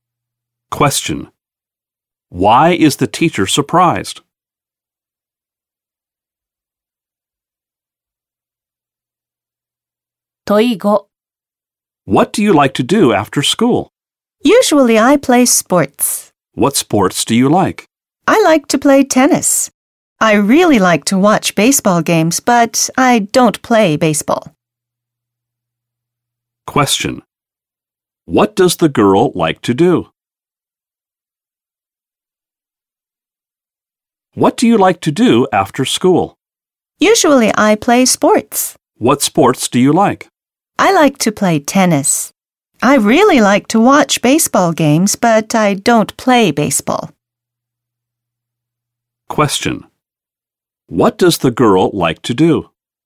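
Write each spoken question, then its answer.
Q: What does the girl like to do?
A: Play tennis and watch baseball games.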